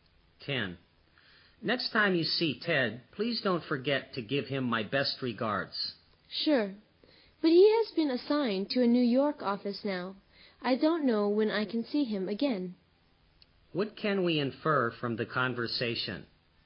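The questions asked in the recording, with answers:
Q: What can we infer from the conversation?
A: Ted now works at a New York office, so the speaker may not see him soon.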